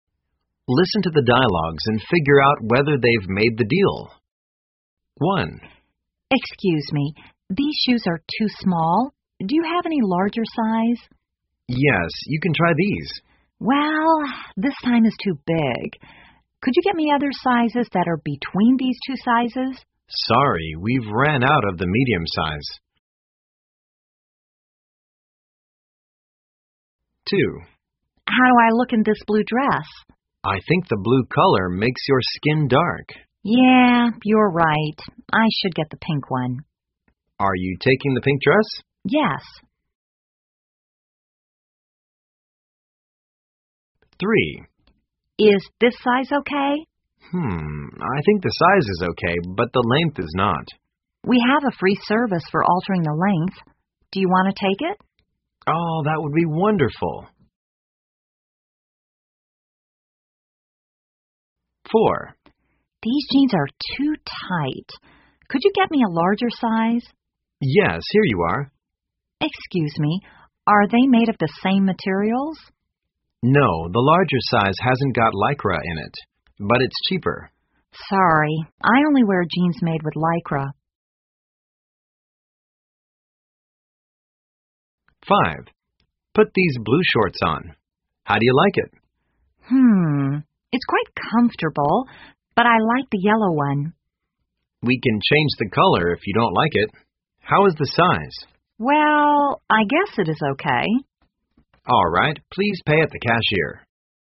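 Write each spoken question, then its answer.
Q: Listen to the dialogues and figure out whether they've made the deal.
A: No

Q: Listen to the dialogues and figure out whether they've made the deal.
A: Yes

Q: Listen to the dialogues and figure out whether they've made the deal.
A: Yes

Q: Listen to the dialogues and figure out whether they've made the deal.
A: No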